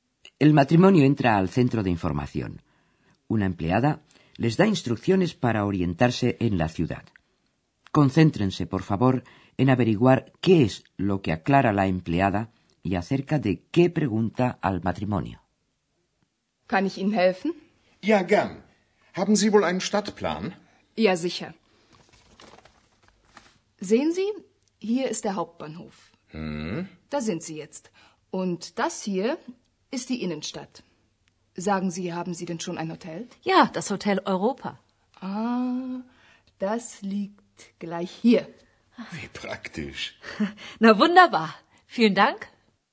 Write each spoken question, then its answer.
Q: Concéntrense, por favor, en averiguar qué es lo que aclara la empleada y acerca de qué pregunta al matrimonio.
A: La empleada le aclara al matrimonio, señalándoselo en el plano, el lugar donde se encuentran, y les pregunta que si ya tienen un hotel.